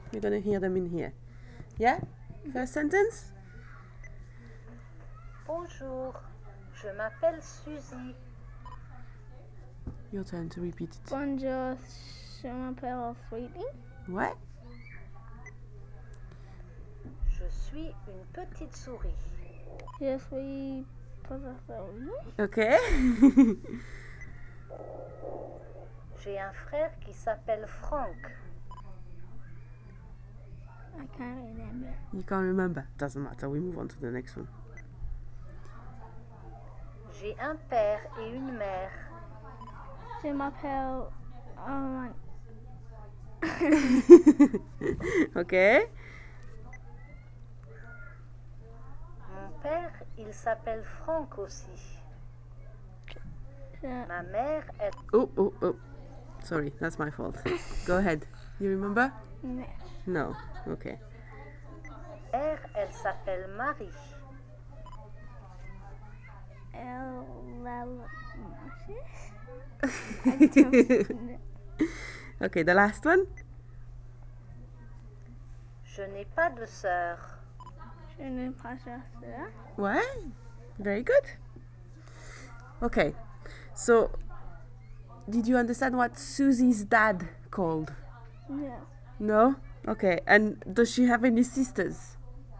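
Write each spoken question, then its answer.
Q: So did you understand what Susie's dad called?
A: Frank

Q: and does she have any sisters?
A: No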